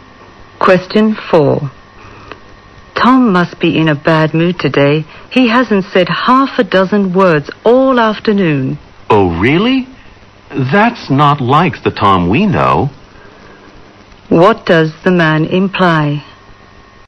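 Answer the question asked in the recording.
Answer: Tom is usually talkative.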